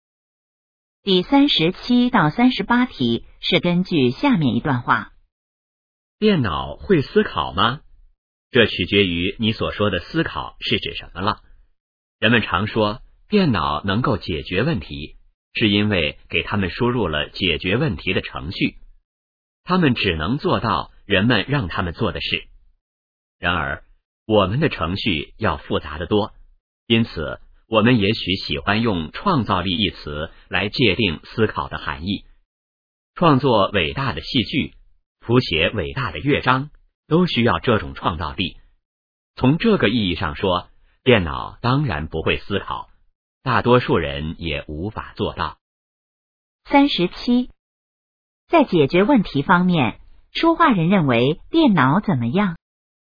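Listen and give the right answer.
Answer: 只能做人们让它做的事(靠输入的程序解决问题)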